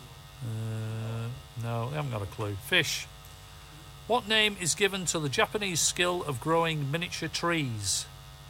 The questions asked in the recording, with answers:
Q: What name is given to the Japanese skill of growing miniature trees?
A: Bonsai is the correct answer.